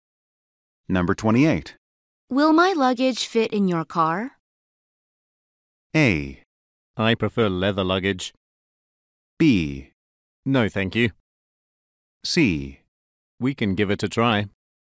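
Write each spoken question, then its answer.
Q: Will my luggage fit in your car?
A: C: We can give it a try.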